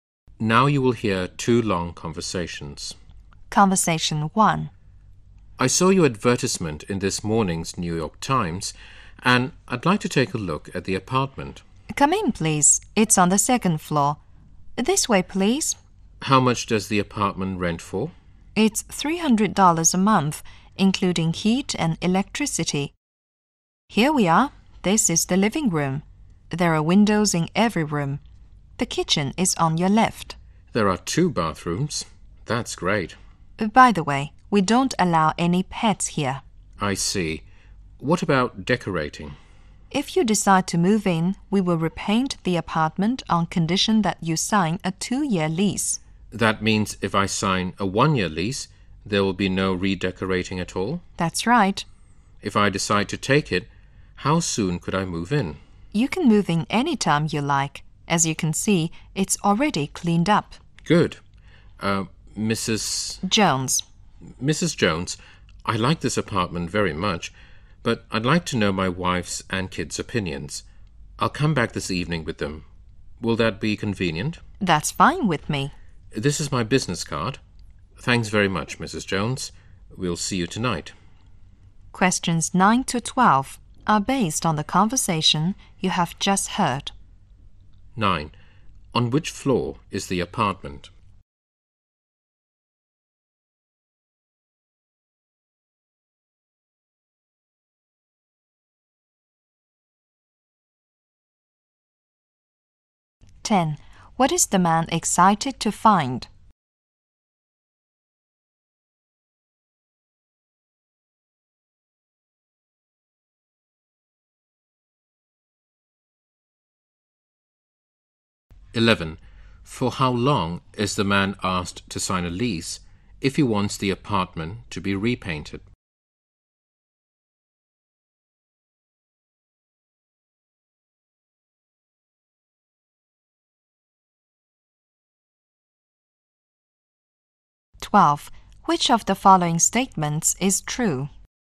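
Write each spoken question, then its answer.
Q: On which floor is the apartment?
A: The second floor

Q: For how long is the man asked to sign a lease if he wants the apartment to be repainted?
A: Two years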